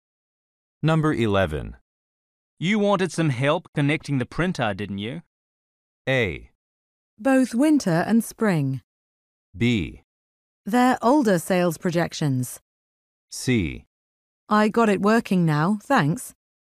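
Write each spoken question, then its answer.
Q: You wanted some help connecting the printer, didn't you?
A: C: I got it working now, thanks.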